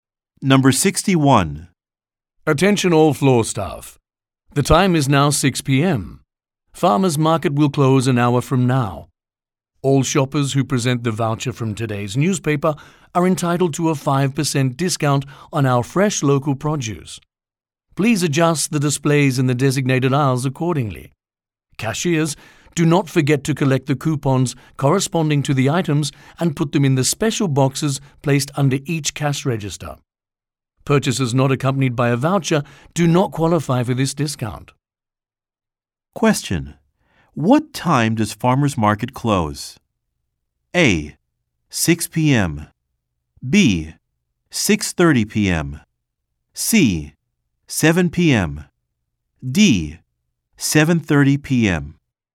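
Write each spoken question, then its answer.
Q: What time does Farmers Market close?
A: C: 7 p.m.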